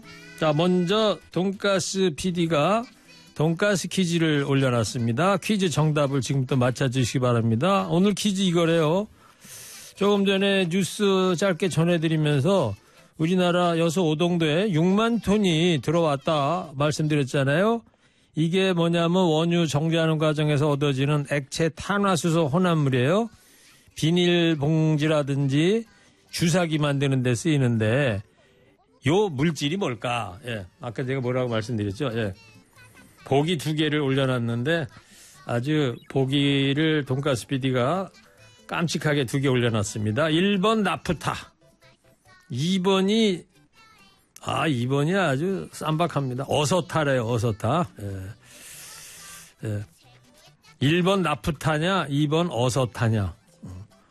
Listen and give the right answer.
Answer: 1번 적으시면 됩니다.